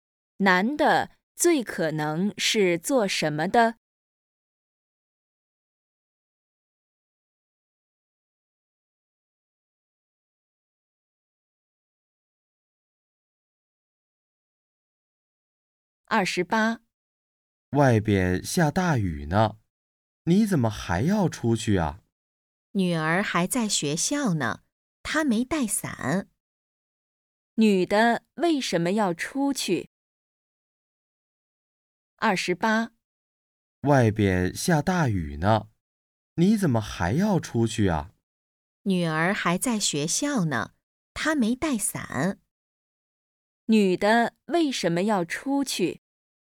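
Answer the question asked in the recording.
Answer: 给女儿送伞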